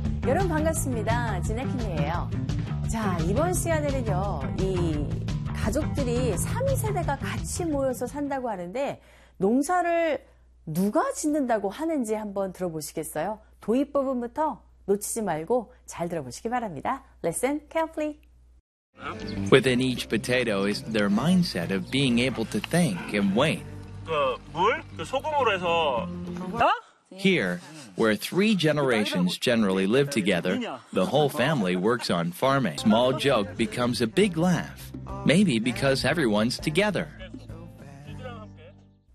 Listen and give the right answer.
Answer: 가족 전체가 다 농사를 짓는다고 하네요.